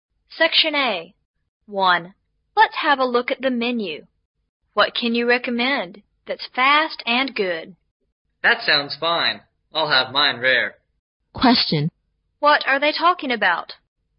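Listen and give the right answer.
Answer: Ordering food from a menu (a steak)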